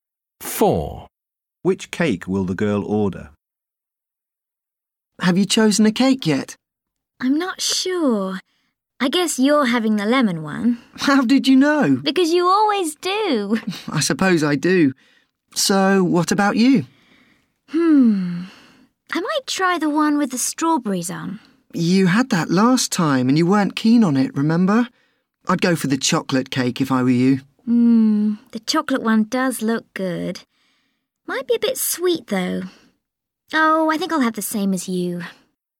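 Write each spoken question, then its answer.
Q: Which cake will the girl order?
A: the lemon cake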